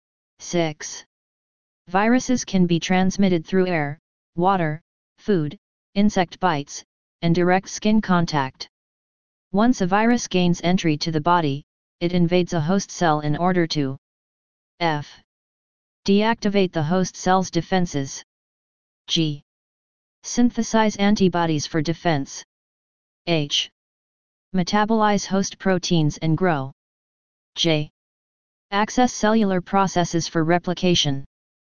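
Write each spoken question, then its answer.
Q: Once a virus gains entry to the body, it invades a host cell in order to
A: J: Access cellular processes for replication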